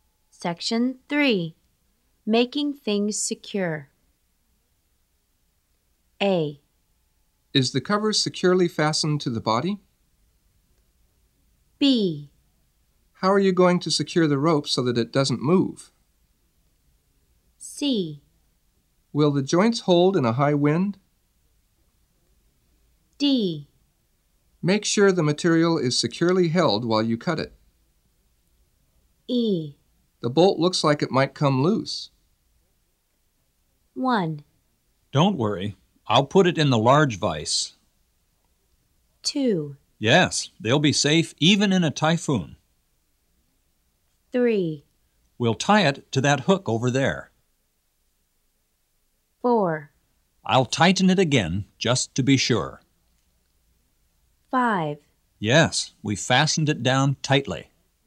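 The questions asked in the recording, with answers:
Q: Don't worry. I'll put it in the large vise.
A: D: Make sure the material is securely held while you cut it.

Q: Yes, they'll be safe even in a typhoon.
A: C: Will the joints hold in a high wind?

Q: We'll tie it to that hook over there.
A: B: How are you going to secure the rope so that it doesn't move?

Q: I'll tighten it again, just to be sure.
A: E: The bolt looks like it might come loose.

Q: Yes, we fastened it down tightly.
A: A: Is the cover securely fastened to the body?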